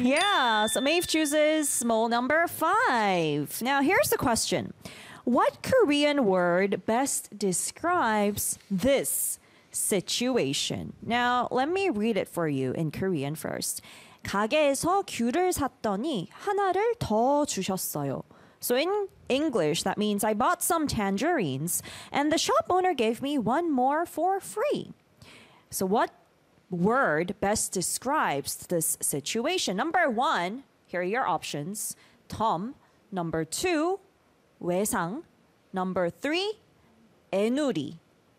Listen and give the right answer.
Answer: So the answer is Tom.